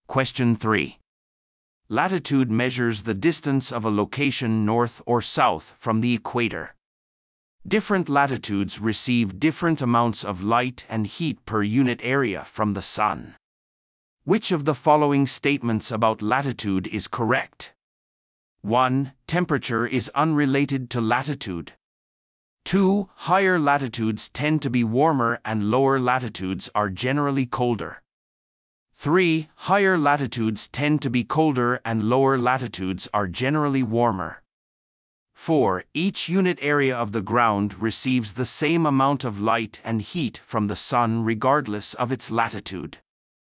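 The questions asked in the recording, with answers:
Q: Which of the following statements about latitude is correct?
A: 3: Higher latitudes tend to be colder and lower latitudes are generally warmer.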